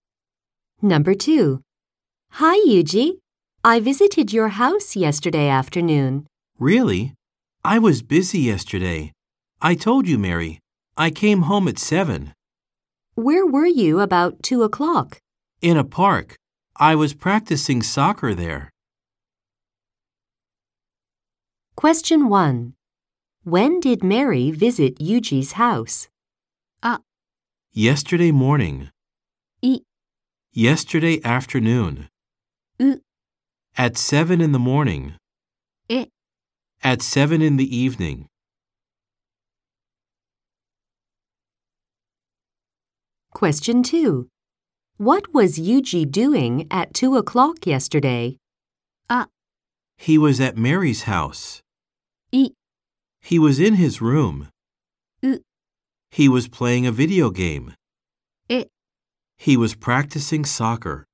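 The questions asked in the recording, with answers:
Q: When did Mary visit Yuji's house?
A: B: Yesterday afternoon.

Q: What was Yuji doing at 2 o'clock yesterday?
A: D: He was practicing soccer.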